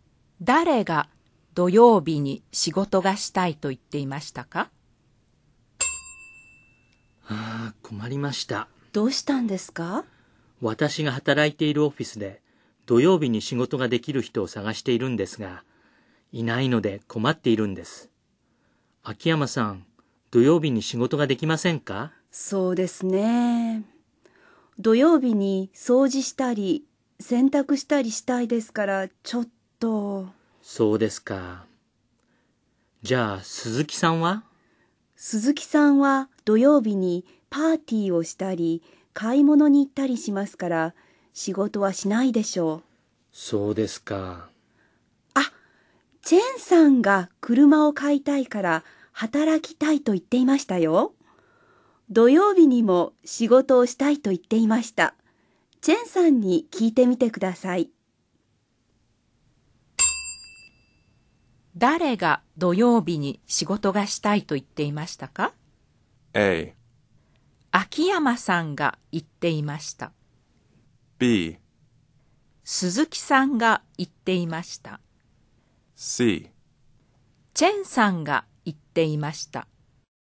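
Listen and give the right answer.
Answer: C: チェンさんが言っていました。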